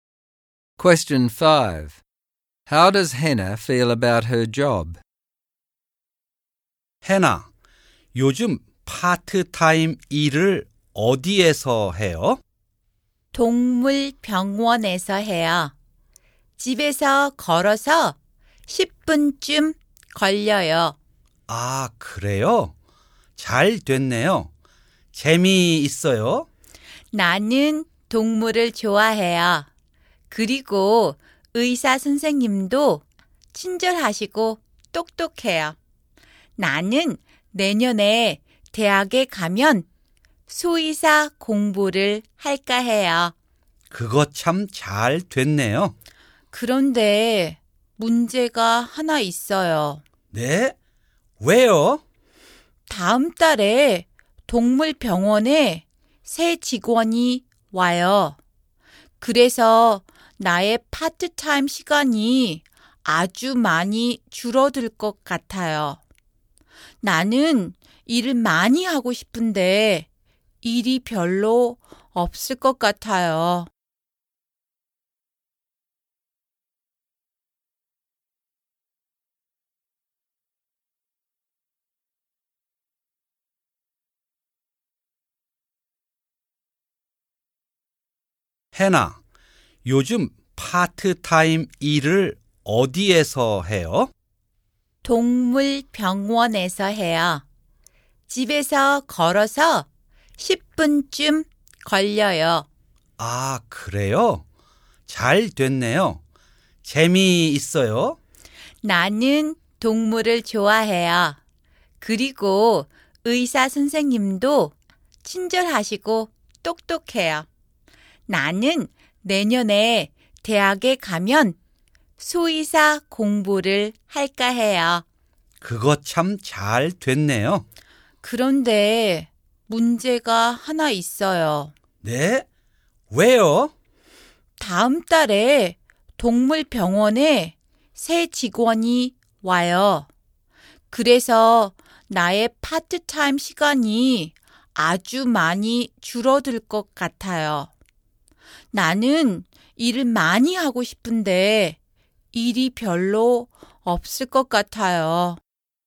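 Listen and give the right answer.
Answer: She enjoys it because she likes animals and the vet is kind, but she is worried because a new employee means her hours will be cut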